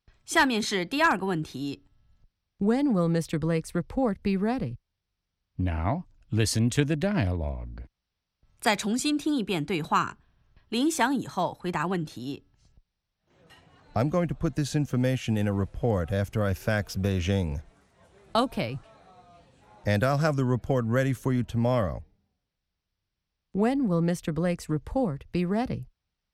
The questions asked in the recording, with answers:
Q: When will Mr. Blake's report be ready?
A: It will be ready tomorrow.